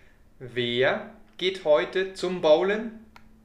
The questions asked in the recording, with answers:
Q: Wer geht heute zum Bowlen?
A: Paula und Natalia. Sie gehen heute zum Bowlen.